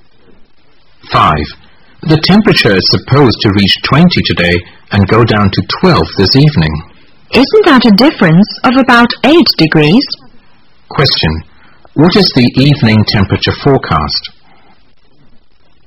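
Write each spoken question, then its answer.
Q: What is the evening temperature forecast?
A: 12 degrees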